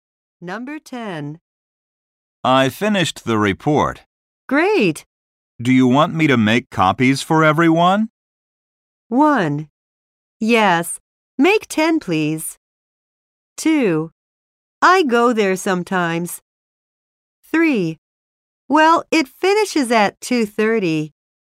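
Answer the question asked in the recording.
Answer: 1: Yes, make 10, please.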